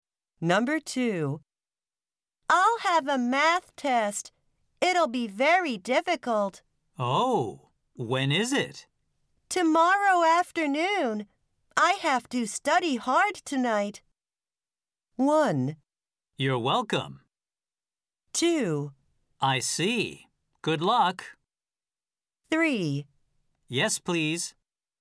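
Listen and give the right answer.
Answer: 2: I see. Good luck.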